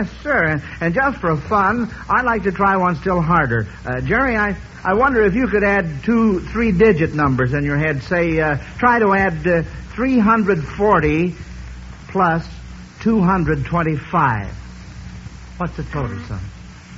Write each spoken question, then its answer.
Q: Say, try to add 340 plus 225.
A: 565 is right.